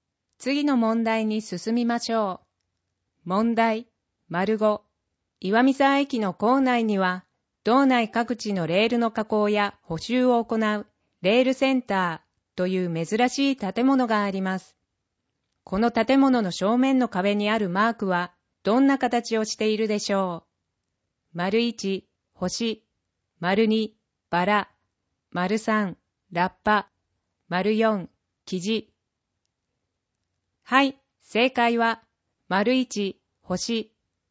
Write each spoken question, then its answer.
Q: この建物の正面の壁にあるマークは、どんな形をしているでしょう。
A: 正解は、1、星